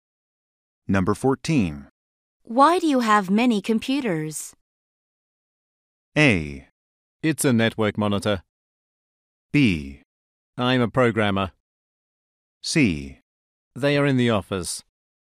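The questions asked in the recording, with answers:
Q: Why do you have many computers?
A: B: I'm a programmer.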